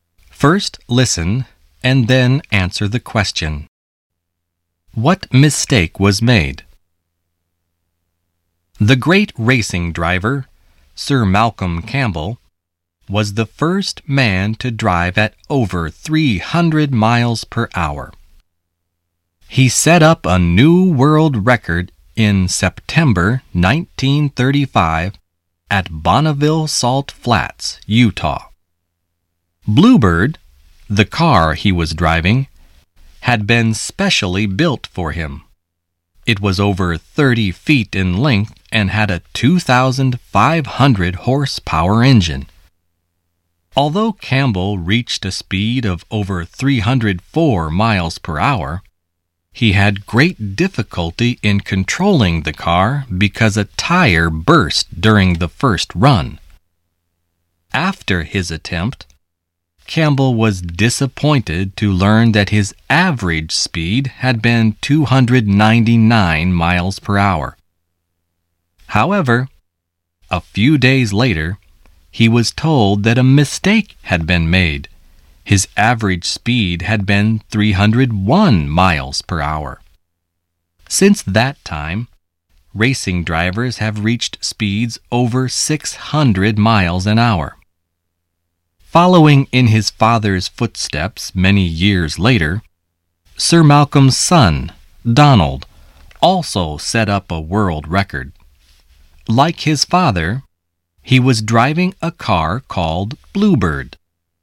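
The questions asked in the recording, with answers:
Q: What mistake was made?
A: His average speed was wrongly given as 299 miles per hour; it had actually been 301 miles per hour.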